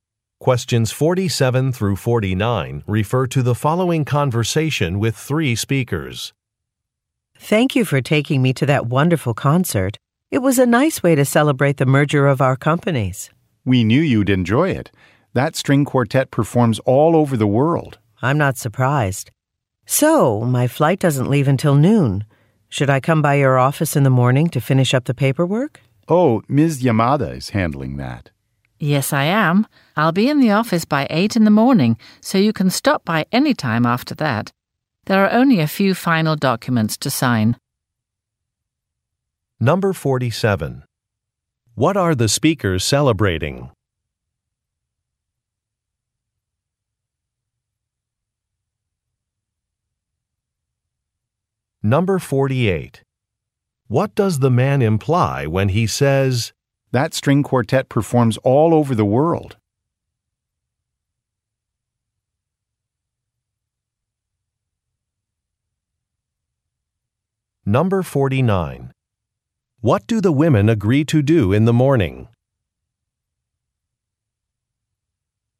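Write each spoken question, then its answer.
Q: What are the speakers celebrating?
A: A merger of their companies

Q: What do the women agree to do in the morning?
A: Finish the paperwork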